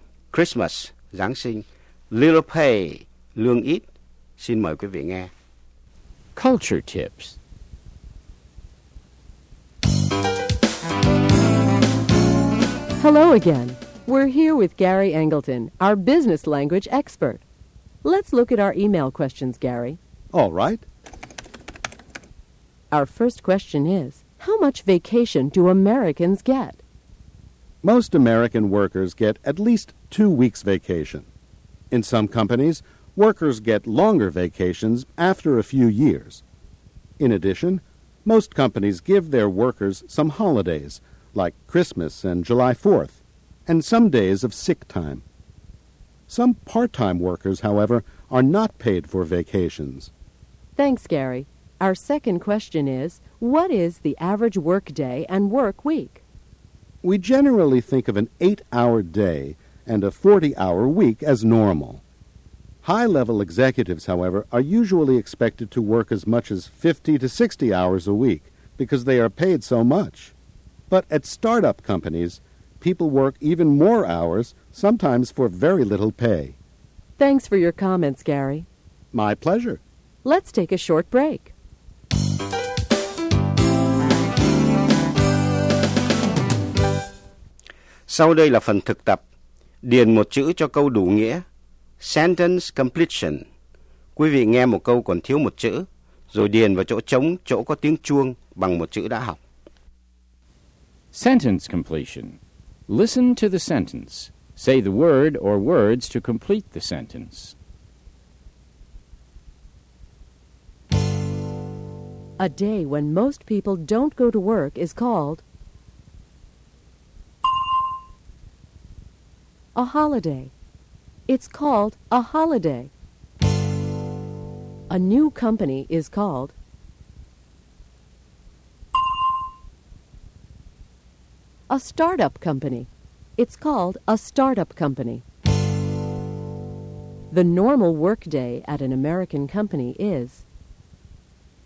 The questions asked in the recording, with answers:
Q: A day when most people don't go to work is called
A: a holiday. It's called a holiday.

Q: The normal work day at an American company is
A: 8 hours. The normal work day is 8 hours.